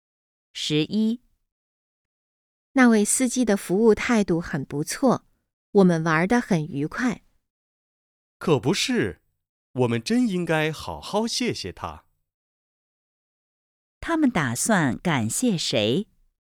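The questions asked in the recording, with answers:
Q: 他们打算感谢谁?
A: 那位司机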